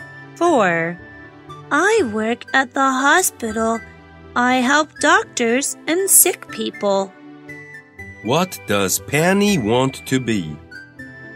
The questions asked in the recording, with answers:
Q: What does Penny want to be?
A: She wants to be a nurse.